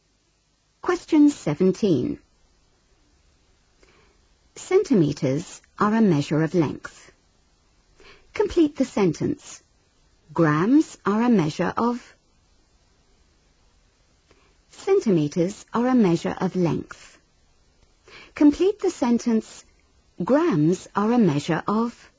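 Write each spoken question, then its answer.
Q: Complete the sentence. Grams are a measure of...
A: mass (weight)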